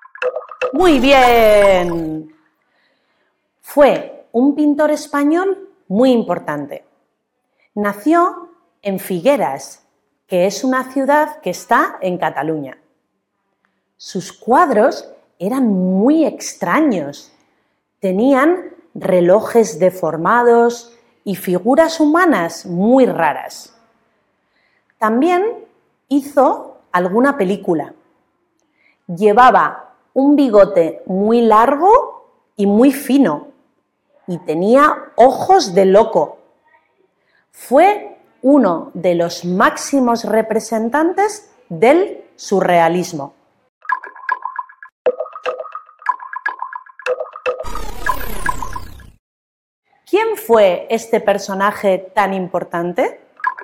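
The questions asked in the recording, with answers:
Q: ¿Quién fue este personaje tan importante?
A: Salvador Dalí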